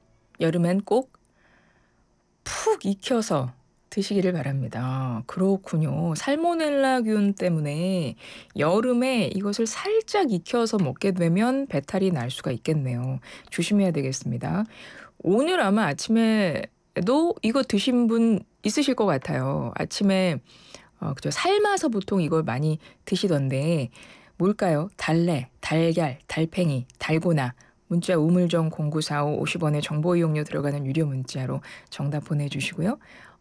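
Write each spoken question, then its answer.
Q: 삶아서 보통 이걸 많이 드시던데 뭘까요?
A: 달걀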